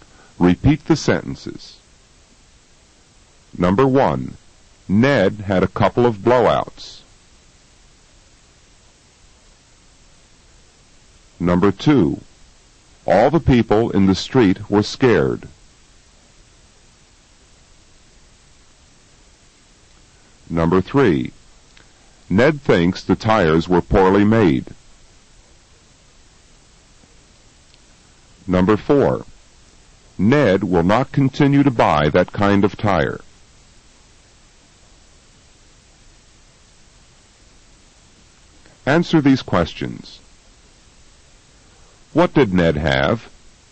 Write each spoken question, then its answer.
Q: What did Ned have?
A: Ned had a couple of blowouts.